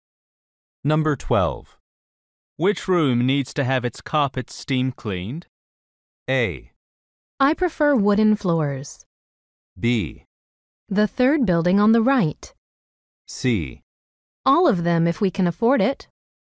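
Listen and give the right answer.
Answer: C: All of them if we can afford it.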